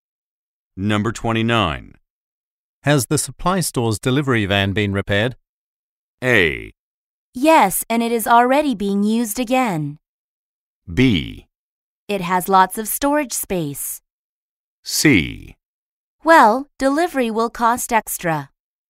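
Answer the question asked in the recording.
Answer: A: Yes, and it is already being used again.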